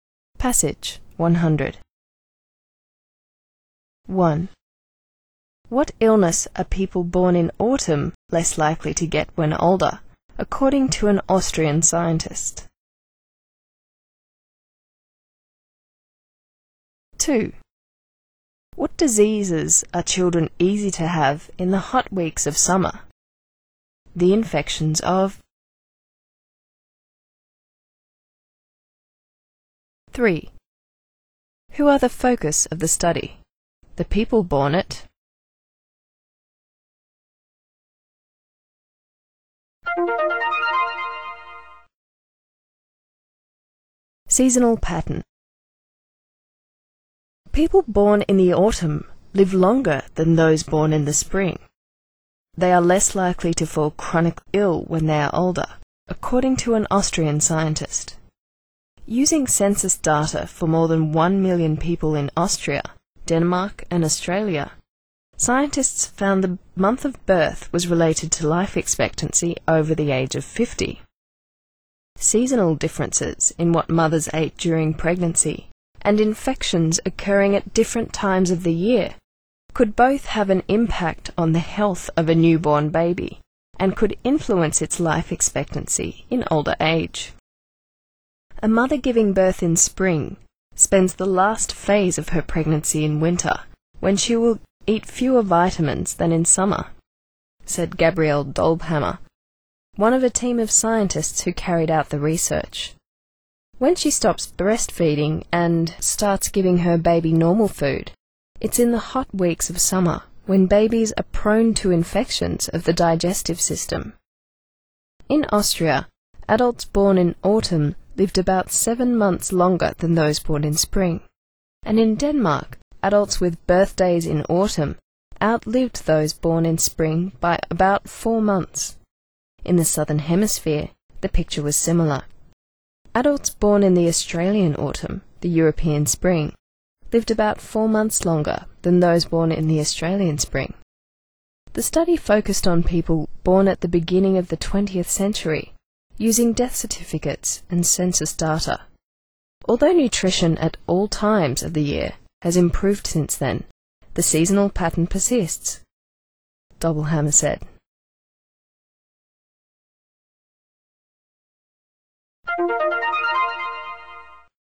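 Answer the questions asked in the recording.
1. Chronic illness
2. Infections of the digestive system
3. People born at the beginning of the 20th century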